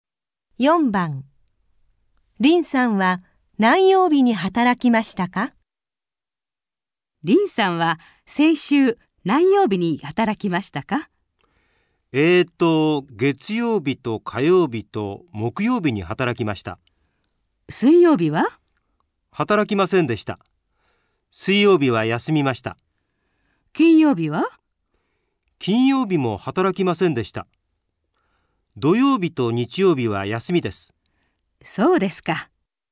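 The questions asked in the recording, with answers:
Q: 林さんは何曜日に働きましたか?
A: 月曜日と火曜日と木曜日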